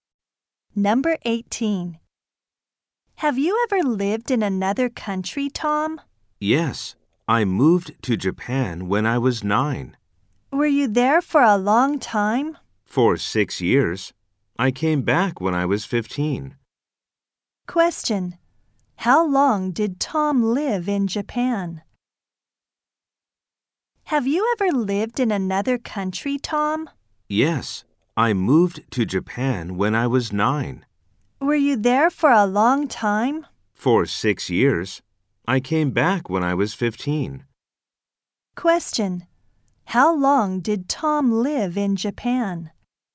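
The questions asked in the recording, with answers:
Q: How long did Tom live in Japan?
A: For 6 years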